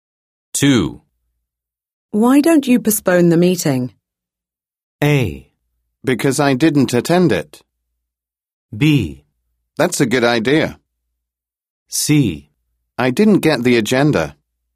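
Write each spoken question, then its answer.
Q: Why don't you postpone the meeting?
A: B: That's a good idea.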